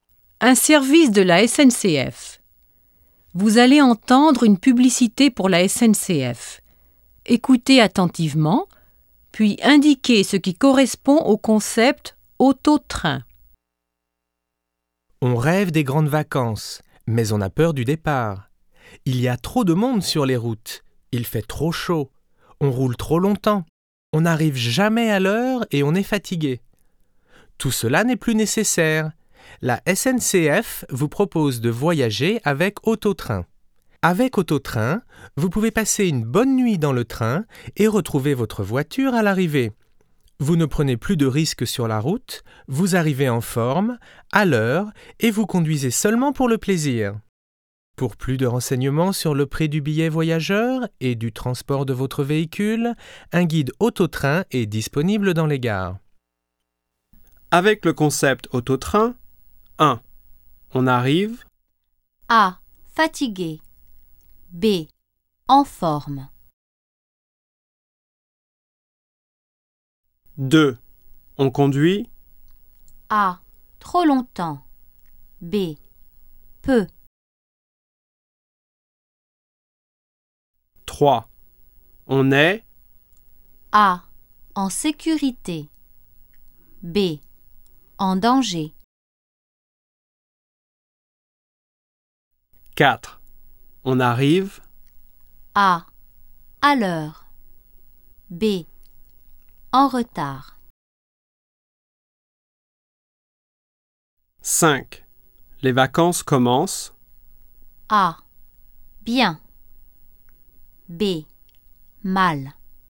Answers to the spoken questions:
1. 1B
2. 2B
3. 3A
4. 4A
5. 5A